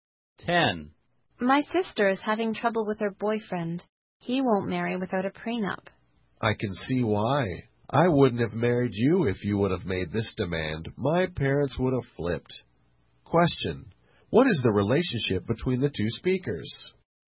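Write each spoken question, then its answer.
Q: What is the relationship between the two speakers?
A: Husband and wife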